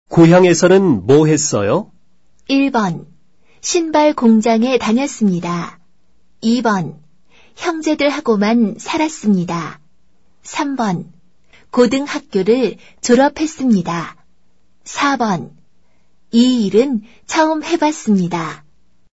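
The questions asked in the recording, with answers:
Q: 고향에서는 뭐 했어요?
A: 1: 신발 공장에 다녔습니다.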